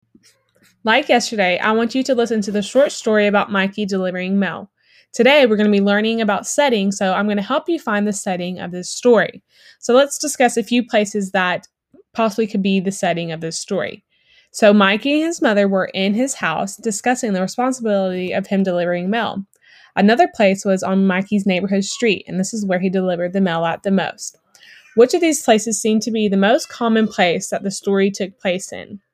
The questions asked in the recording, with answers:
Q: Which of these places seemed to be the most common place that the story took place in?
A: My answer to this question would be Mikey's neighborhood street